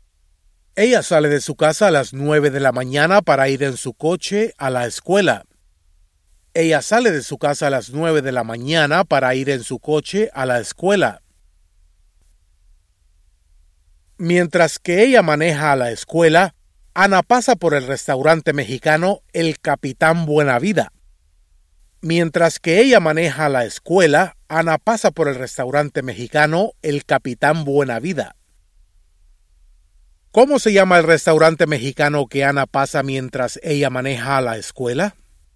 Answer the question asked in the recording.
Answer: El restaurante mexicano que Ana pasa mientras que ella maneja a la escuela se llama El Capitán Buena Vida.